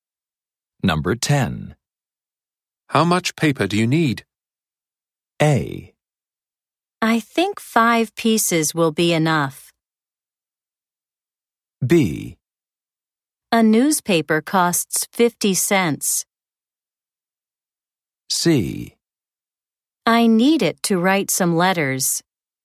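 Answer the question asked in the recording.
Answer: A: I think 5 pieces will be enough.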